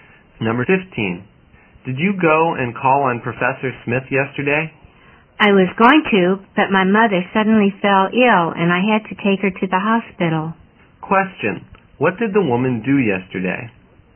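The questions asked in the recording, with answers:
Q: what did the woman do yesterday?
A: She took her sick mother to the hospital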